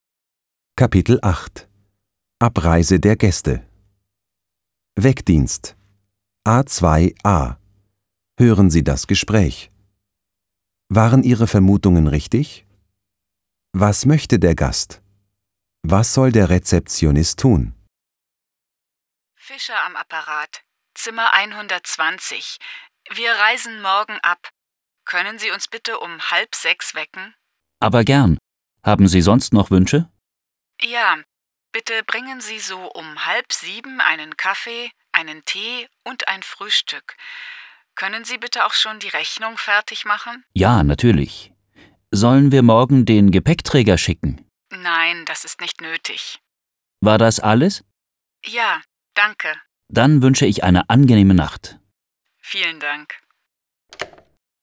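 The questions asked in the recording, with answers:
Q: Was möchte der Gast? Was soll der Rezeptionist tun?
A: Wecken um 5:30, um 6:30 Kaffee, Tee und Frühstück bringen und die Rechnung fertig machen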